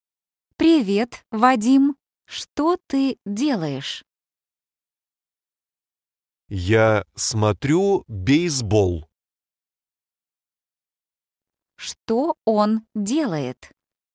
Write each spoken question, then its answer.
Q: Что он делает?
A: Он смотрит бейсбол.